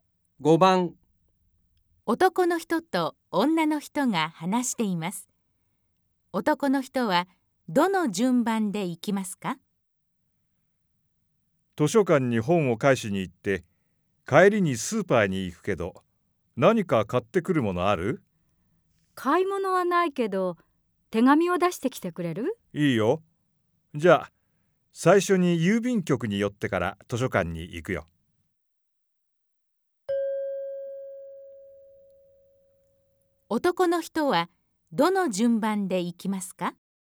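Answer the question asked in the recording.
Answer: 郵便局、図書館、スーパー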